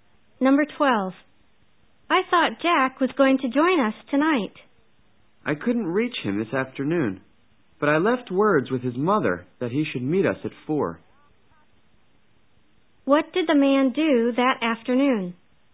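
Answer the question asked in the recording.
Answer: He left word with Jack's mother to meet them at 4.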